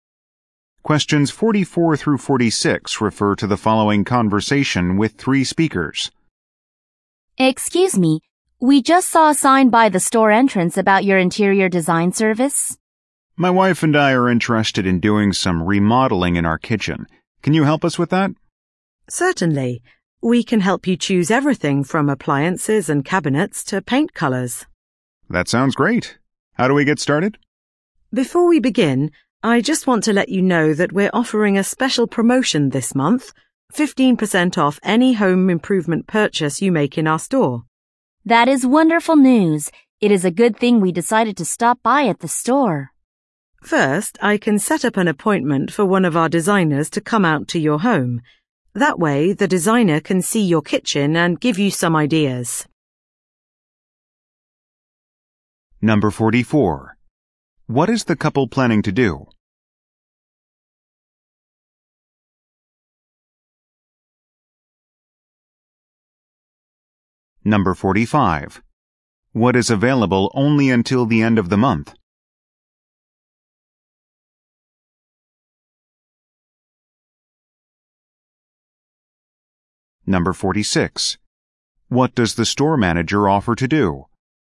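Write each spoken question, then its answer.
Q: What is the couple planning to do?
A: Remodel their kitchen

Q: What is available only until the end of the month?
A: 15% off home improvement purchases

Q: What does the store manager offer to do?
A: Set up a designer's visit to their home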